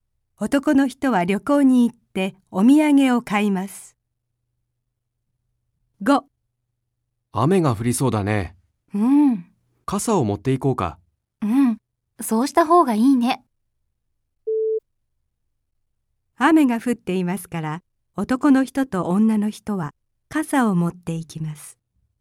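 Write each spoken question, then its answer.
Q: 雨が降っていますから、男の人と女の人は傘を持っていきます。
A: ×(まだ降っていない)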